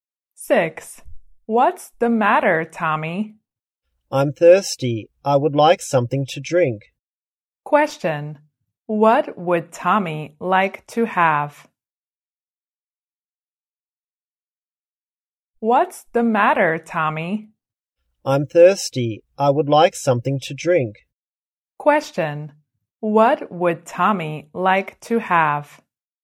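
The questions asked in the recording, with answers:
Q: What would Tommy like to have?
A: Something to drink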